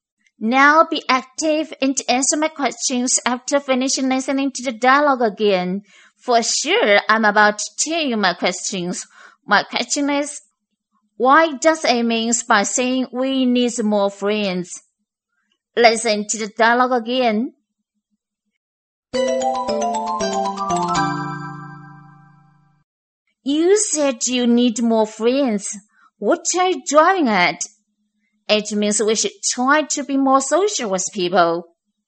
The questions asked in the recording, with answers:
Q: My question is, why does it mean by saying we need more friends?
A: The answer is, A wants us to be more social with people.